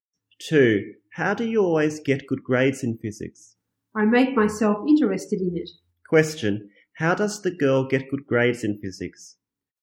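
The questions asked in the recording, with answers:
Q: Question, how does the girl get good grades in physics?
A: She makes herself interested in it.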